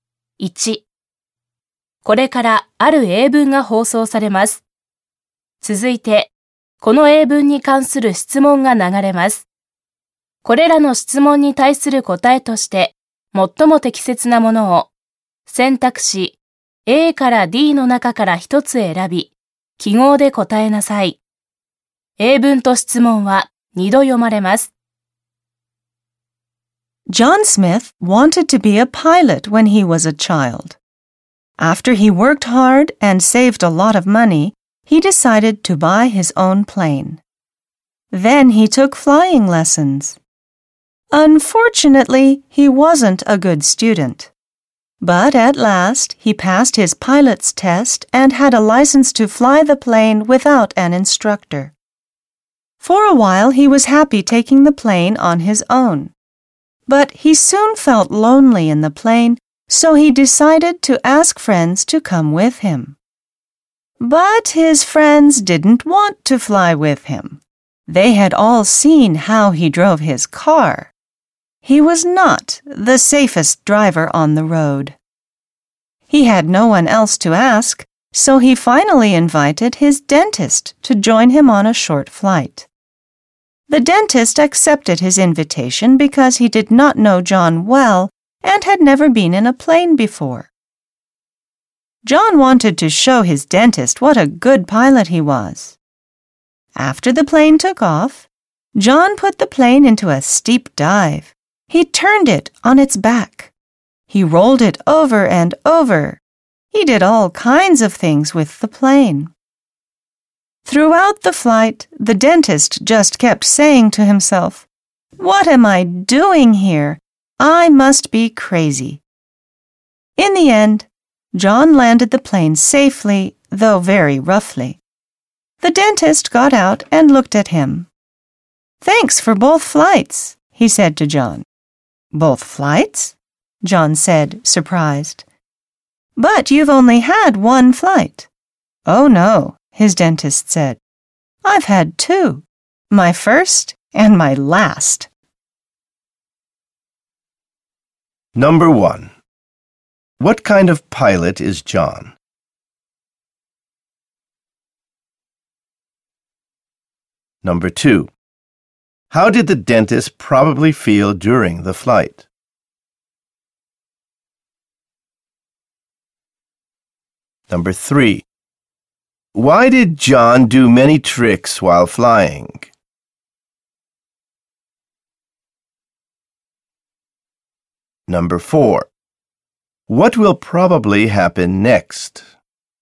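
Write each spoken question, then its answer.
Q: Why did John do many tricks while flying?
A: To show the dentist what a good pilot he was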